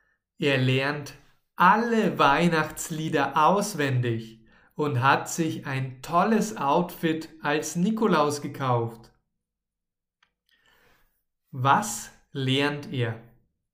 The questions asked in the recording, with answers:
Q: Was lernt er?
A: Er lernt alle Weihnachtslieder auswendig.